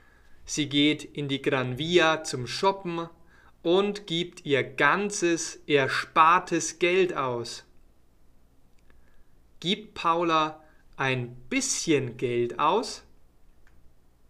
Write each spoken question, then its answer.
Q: Gibt Paula ein bisschen Geld aus?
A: Nein, nicht nur ein bisschen.